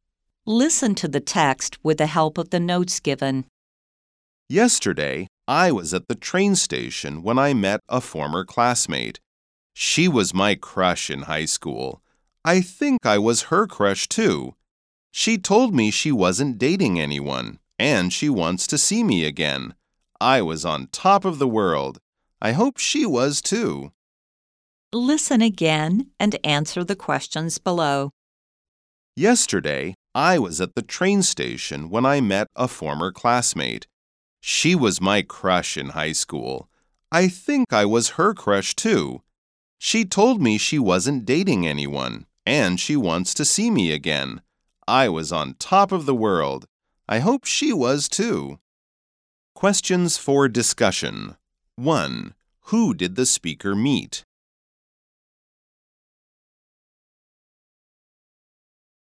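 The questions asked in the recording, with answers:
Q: Who did the speaker meet?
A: A former classmate, his high school crush

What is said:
Yesterday, I was at the train station when I met a former classmate. She was my crush in high school. I think I was her crush, too. She told me she wasn't dating anyone, and she wants to see me again. I hope she was, too.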